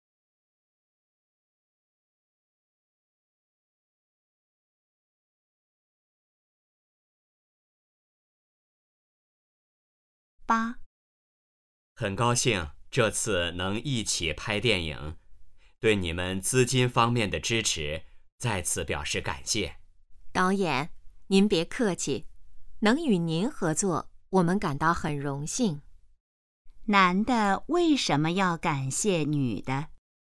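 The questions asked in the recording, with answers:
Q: 男的为什么要感谢女的?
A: 女的在资金方面给予支持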